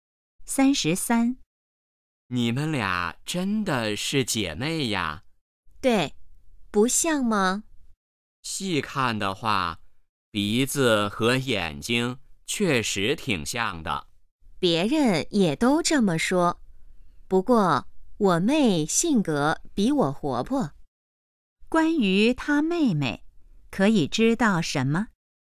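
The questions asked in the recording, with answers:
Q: 关于她妹妹,可以知道什么?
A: 性格比姐姐活泼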